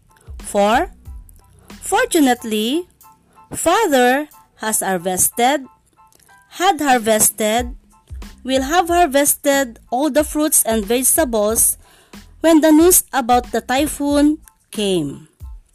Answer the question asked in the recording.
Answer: had harvested is correct.